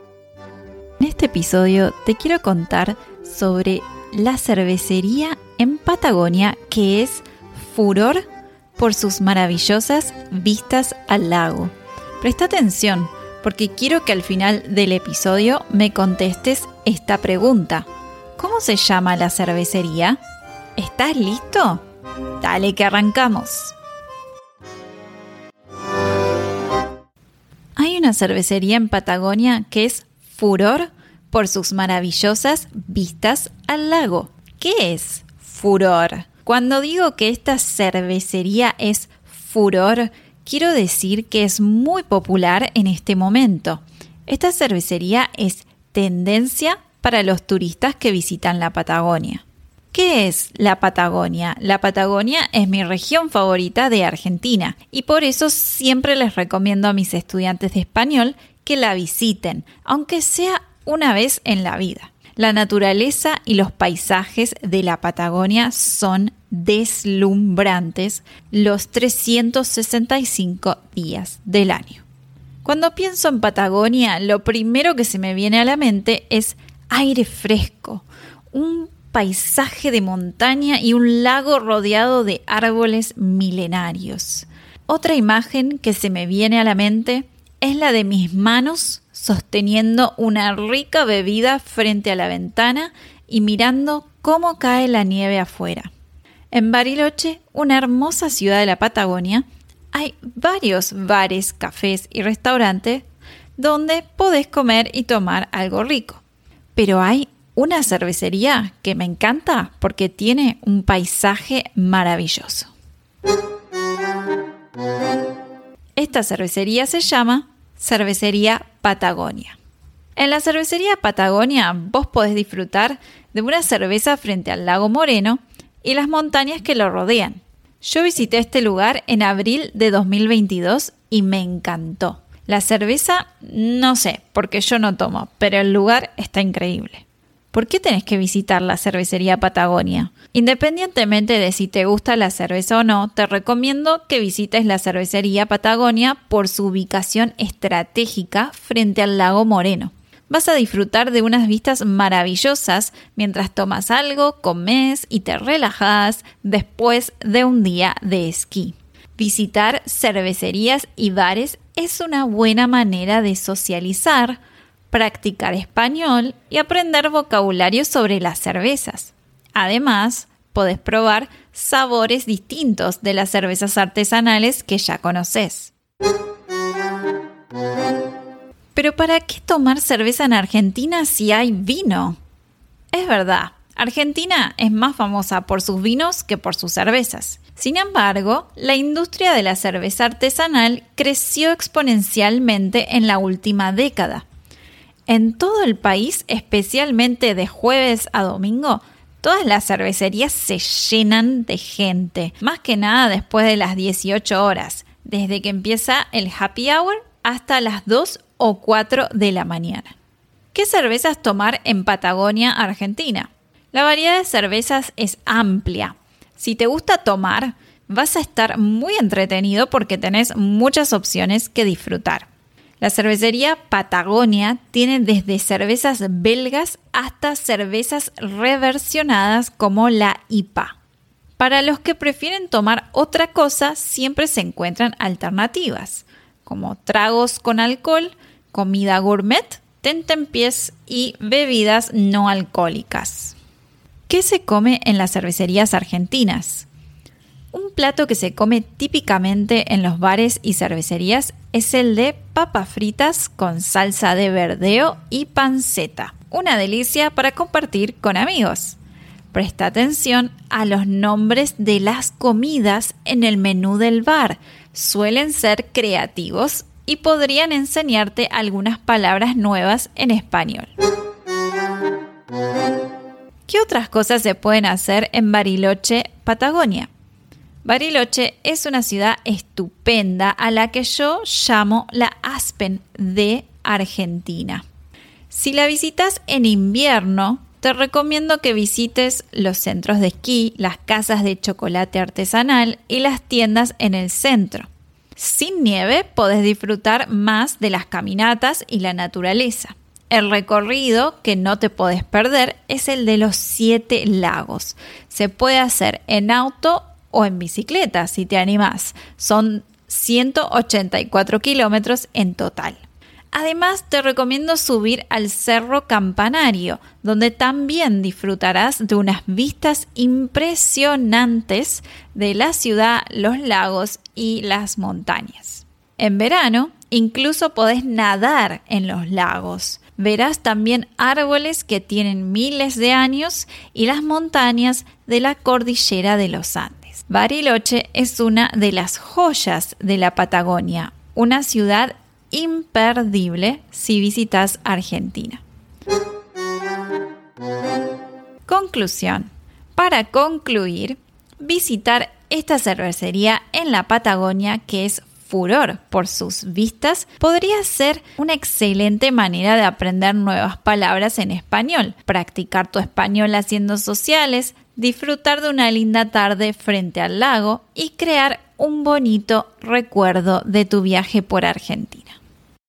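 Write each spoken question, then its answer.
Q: ¿Cómo se llama la cervecería?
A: Cervecería Patagonia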